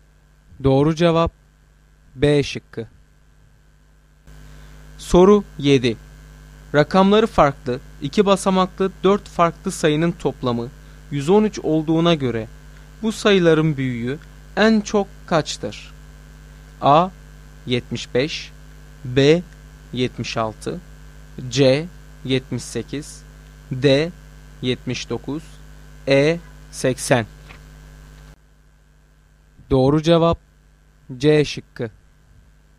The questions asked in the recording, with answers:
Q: Rakamları farklı, 2 basamaklı 4 farklı sayının toplamı 113 olduğuna göre bu sayıların büyüğü en çok kaçtır?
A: Doğru cevap C şıkkı.